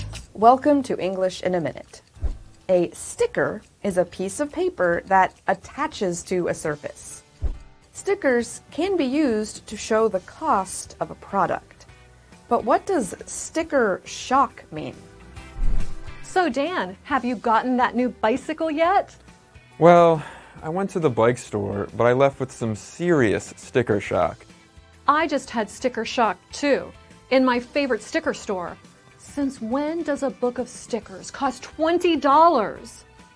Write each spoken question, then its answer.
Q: But what does sticker shock mean?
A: Sticker shock is used to describe the surprise and disappointment someone feels when they find out how much something costs.